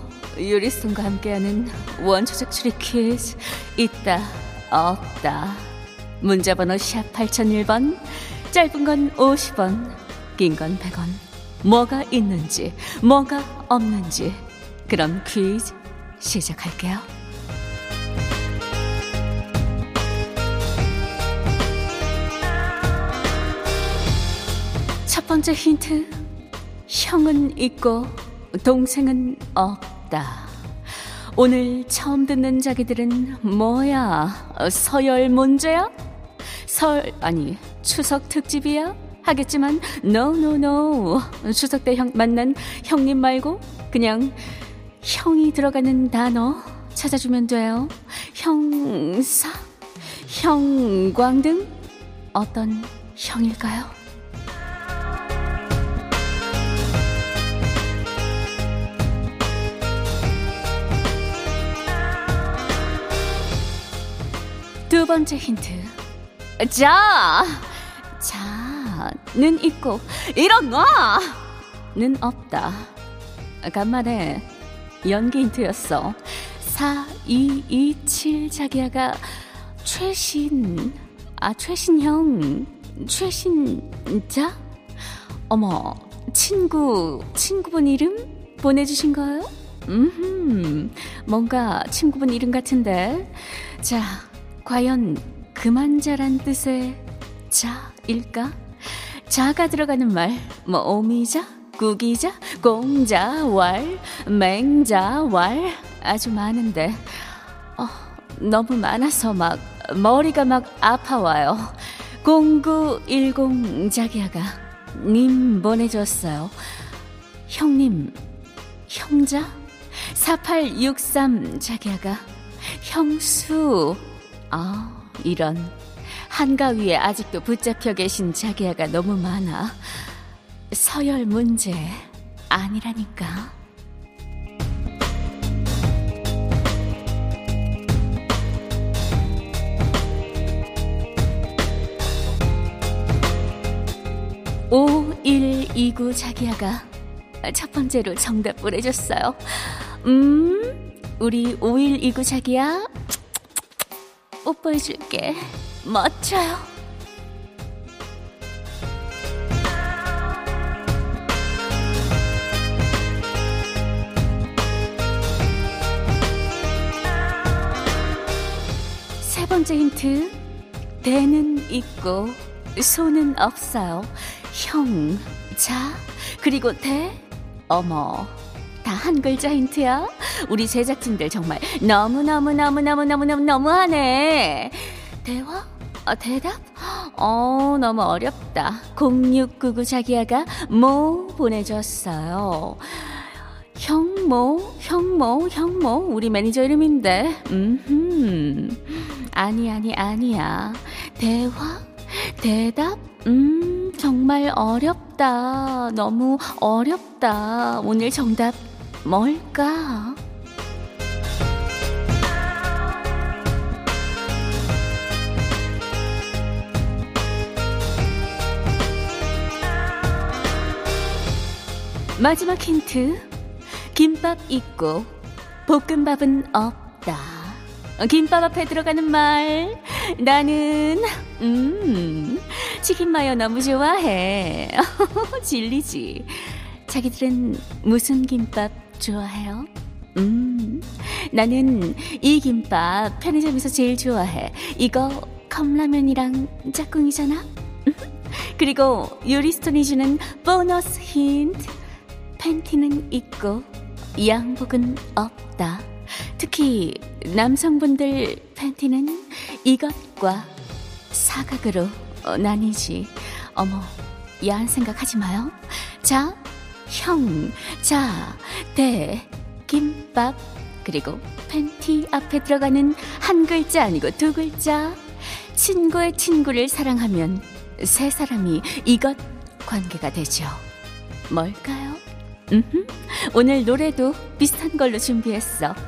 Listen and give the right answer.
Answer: 오늘 정답은 삼각이었습니다.